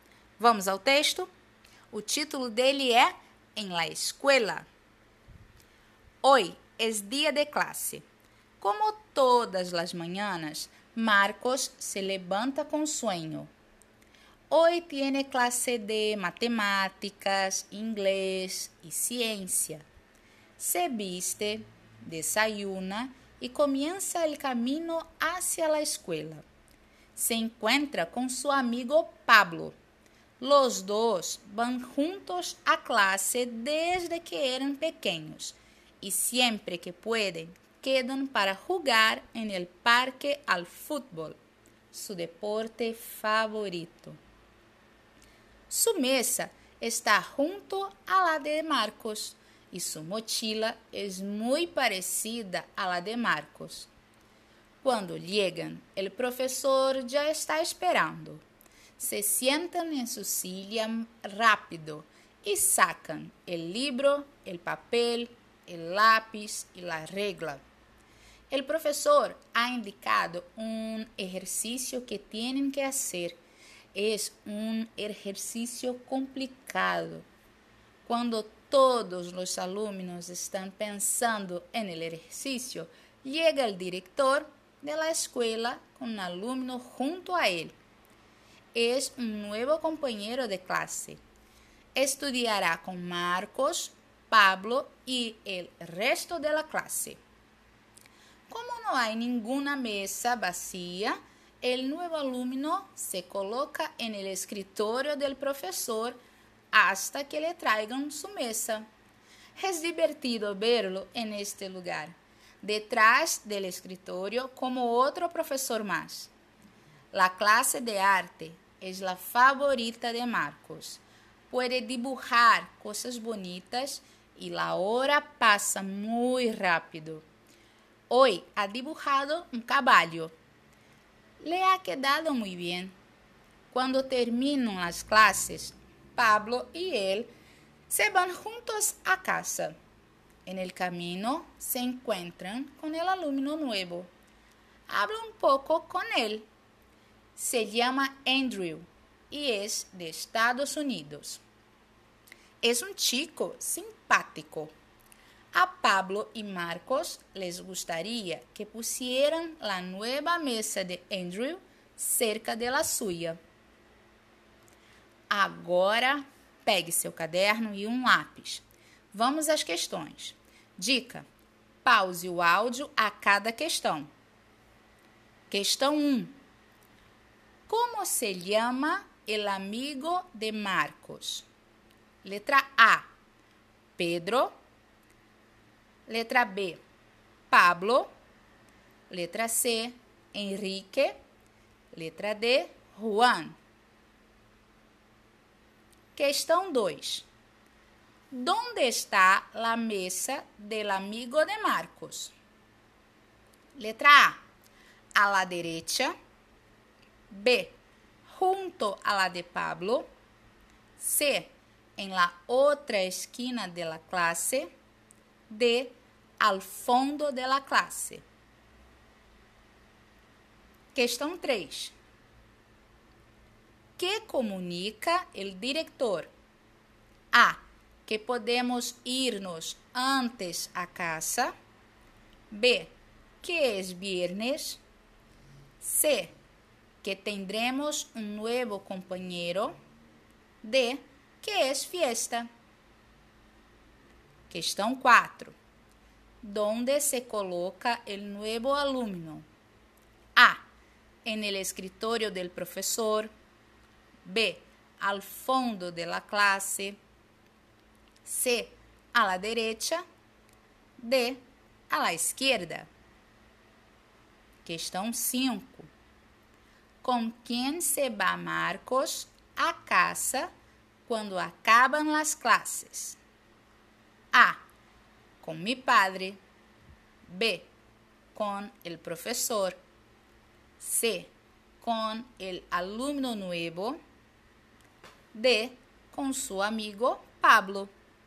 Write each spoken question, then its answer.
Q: Como se llama el amigo de Marcos?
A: Letra B. Pablo.

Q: que comunica o diretor?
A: Letra C. Que tendremos um novo companheiro.

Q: Donde se coloca o novo aluno?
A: Letra A. En el escritório del professor.

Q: Com quem se va Marcos a caça quando acabam as classes?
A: Letra D, com seu amigo Pablo.